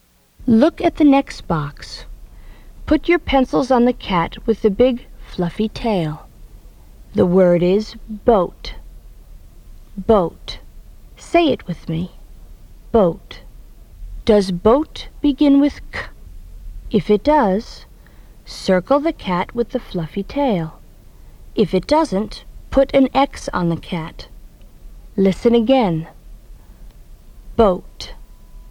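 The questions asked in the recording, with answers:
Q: Does boat begin with k?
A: No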